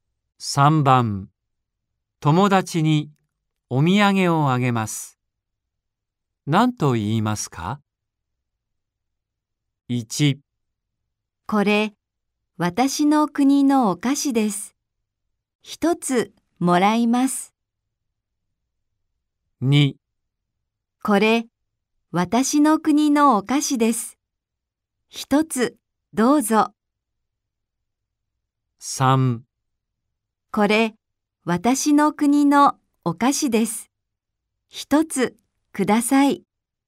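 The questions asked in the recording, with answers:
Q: 友達にお土産をあげます。何と言いますか ?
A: 2: これ、私の国のお菓子です。一つどうぞ。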